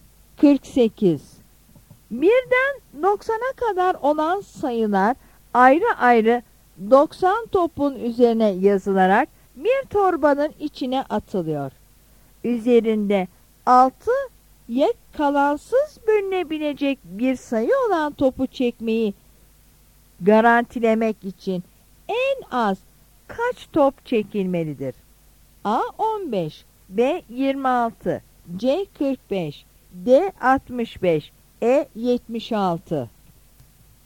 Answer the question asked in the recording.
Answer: Yanıt E'dir.